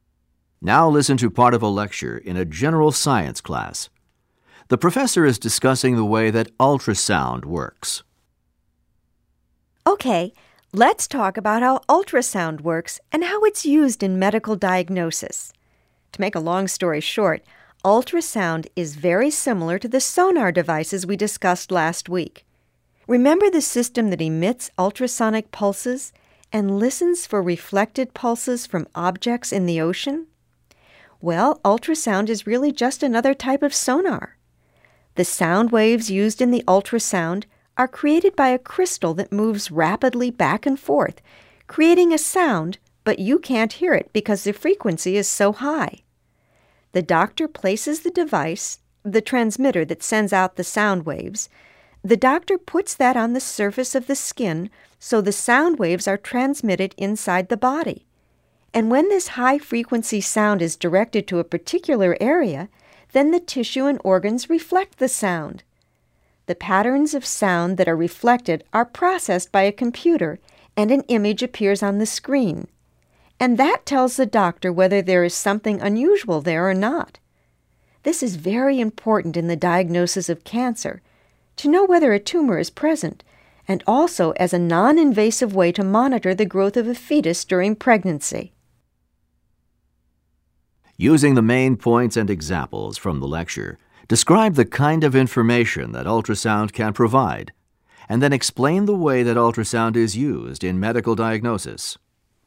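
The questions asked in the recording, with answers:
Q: Using the main points and examples from the lecture, describe the kind of information that ultrasound can provide, and then explain the way that ultrasound is used in medical diagnosis.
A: Ultrasound shows images of tissue and organs inside the body, like sonar. A transmitter on the skin sends high-frequency sound waves, and the tissue and organs reflect them. A computer turns the reflected patterns into an image that shows doctors if something is unusual. It is used to detect tumors when diagnosing cancer and to monitor a fetus's growth without surgery.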